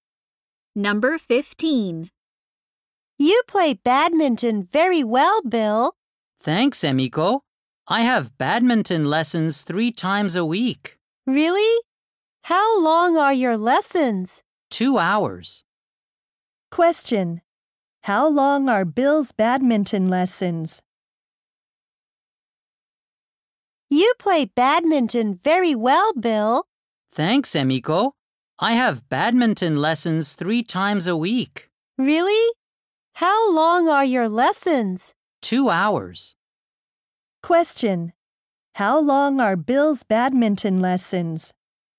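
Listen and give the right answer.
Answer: Two hours.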